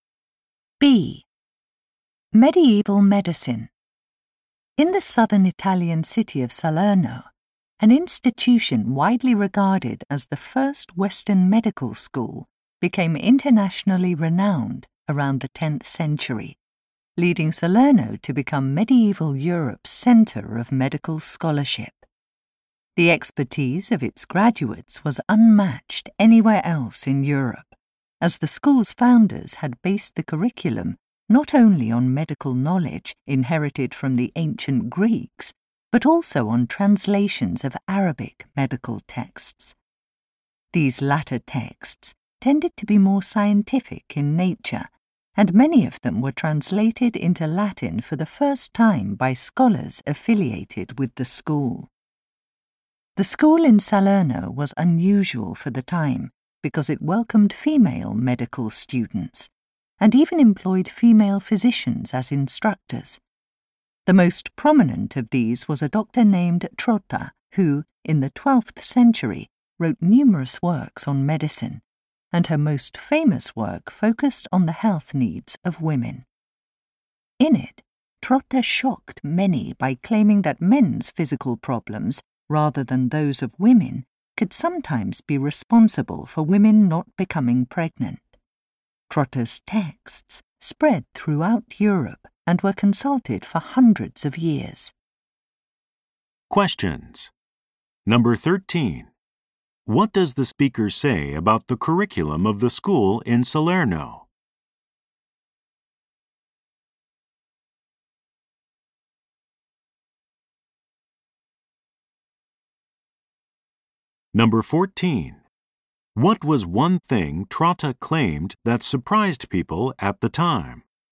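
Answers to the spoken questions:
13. It drew on ancient Greek medical knowledge and on translations of Arabic medical texts.
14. That men's physical problems could sometimes be why women did not become pregnant.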